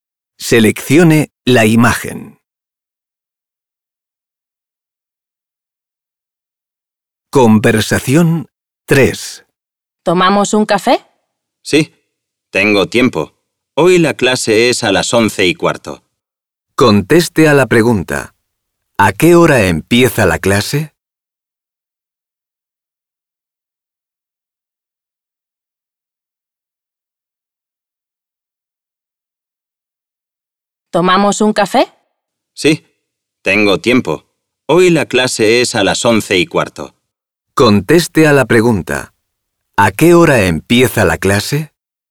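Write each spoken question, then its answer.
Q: ¿A qué hora empieza la clase?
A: A las 11:15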